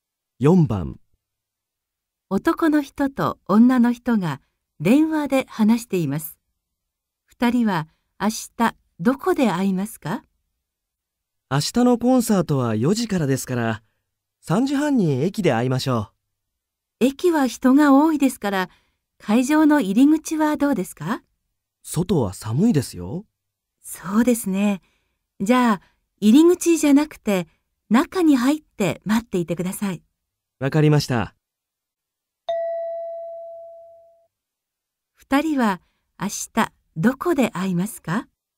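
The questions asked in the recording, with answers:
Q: 二人は明日どこで会いますか?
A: 会場の中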